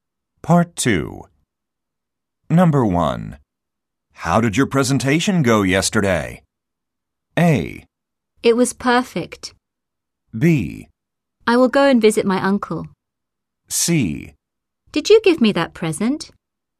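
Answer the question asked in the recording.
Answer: A: It was perfect.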